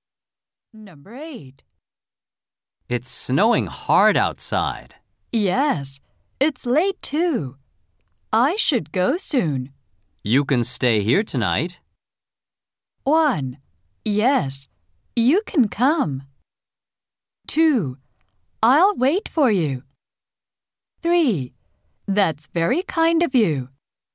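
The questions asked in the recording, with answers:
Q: You can stay here tonight.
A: 3: That's very kind of you.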